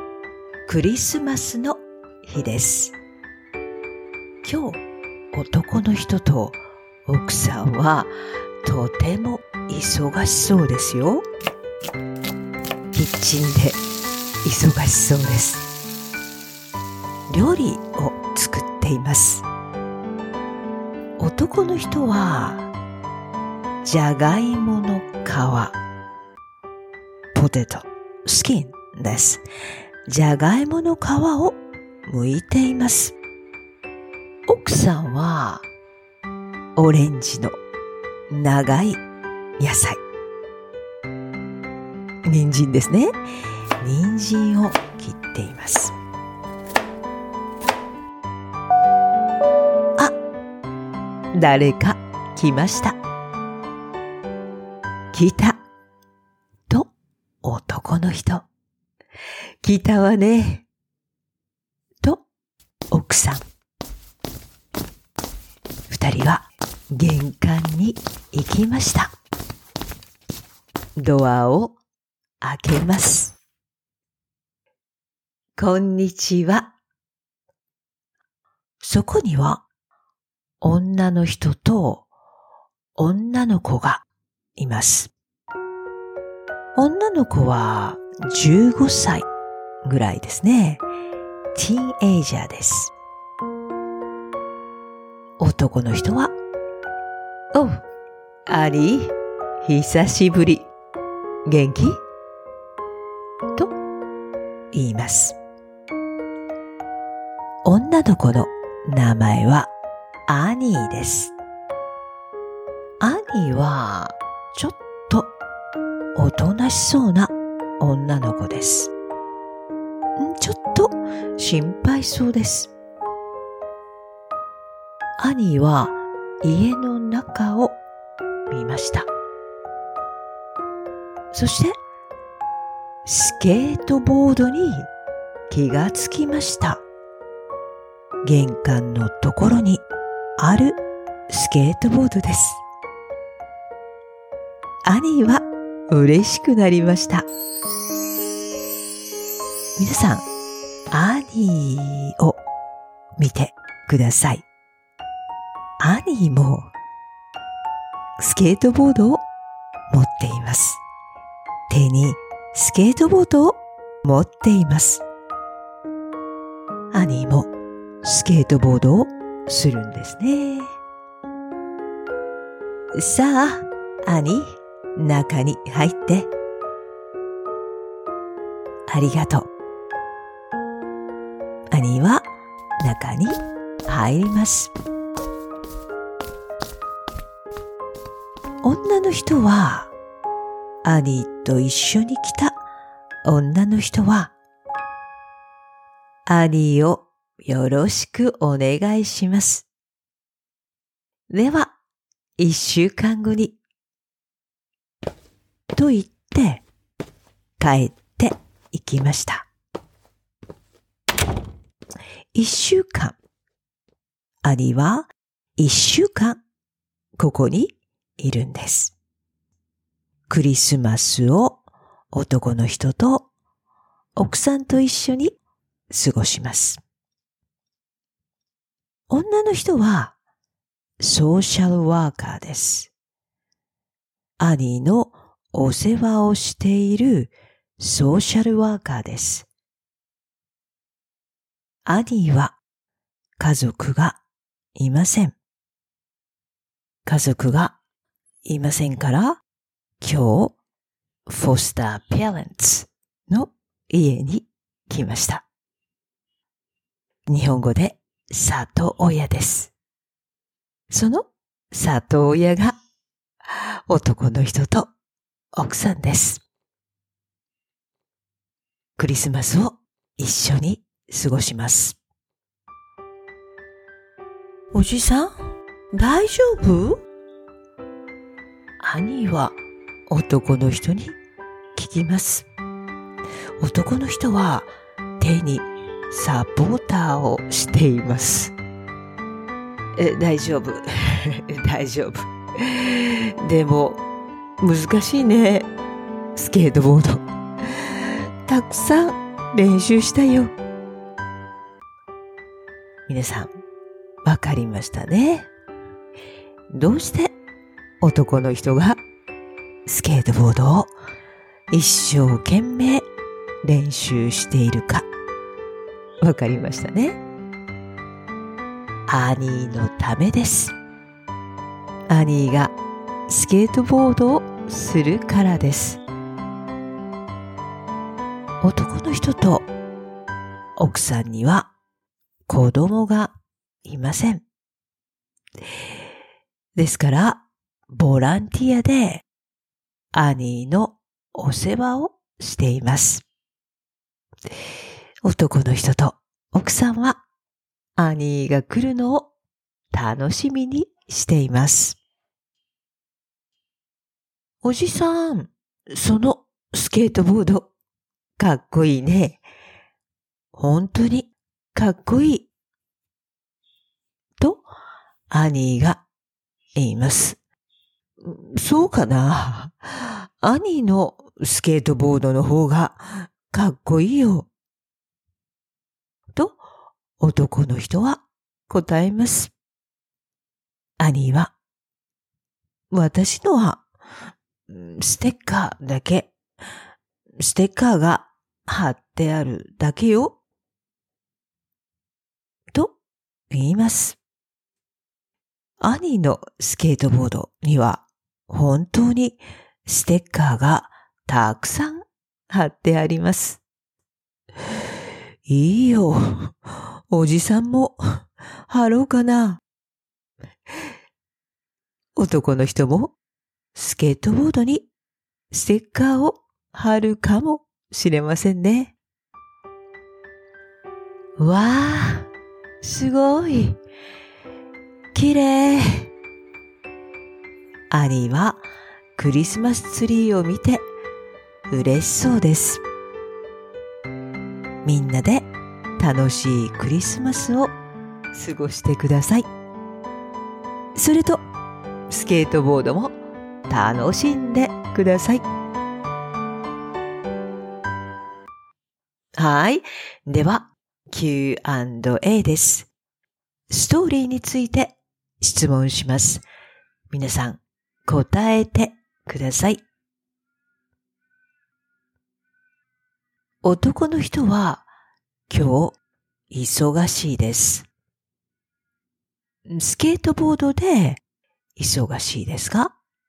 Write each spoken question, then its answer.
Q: 男の人は、今日、忙しいです。スケートボードで、忙しいですか?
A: いいえ、料理です。料理で、忙しいです。